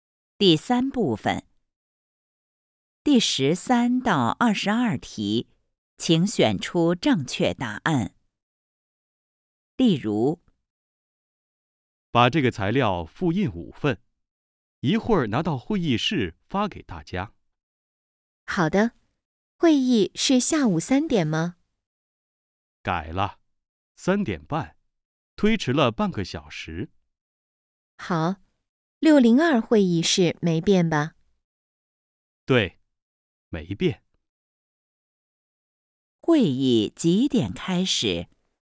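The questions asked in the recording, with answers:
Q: 会议几点开始?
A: 3点半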